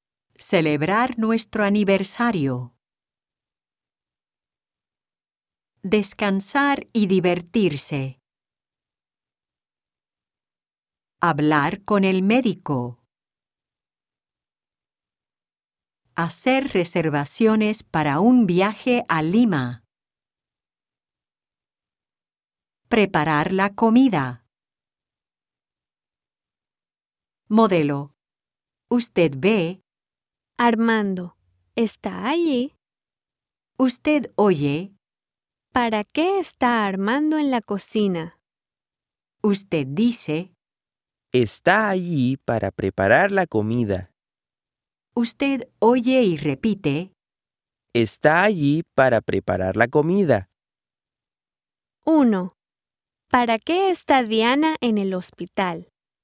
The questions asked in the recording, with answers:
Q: ¿Para qué está Diana en el hospital?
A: Está allí para hablar con el médico.